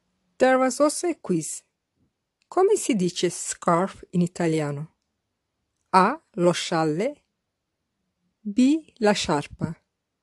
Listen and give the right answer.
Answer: The correct answer is B. La sciarpa.